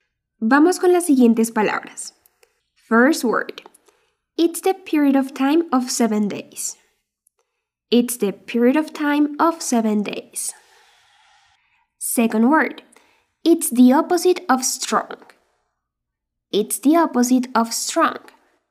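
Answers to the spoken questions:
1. week
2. weak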